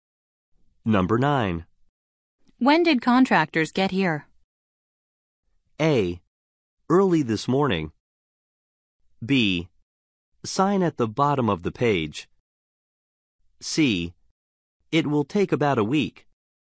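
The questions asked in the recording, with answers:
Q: When did contractors get here?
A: A: Early this morning.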